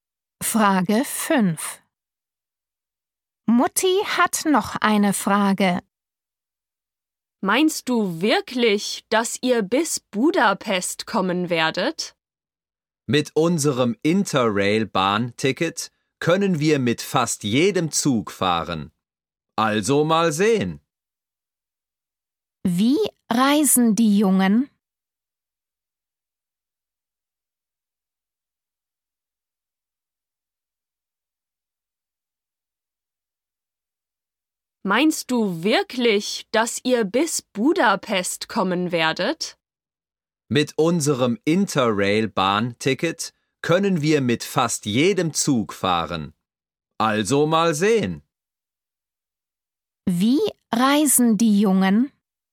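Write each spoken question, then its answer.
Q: Wie reisen die Jungen?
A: mit dem Zug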